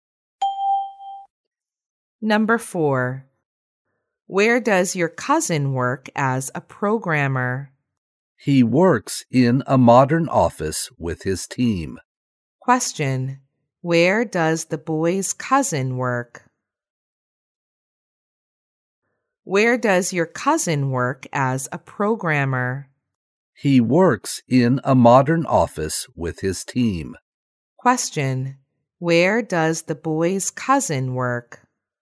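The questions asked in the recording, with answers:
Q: Where does the boy's cousin work?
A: In a modern office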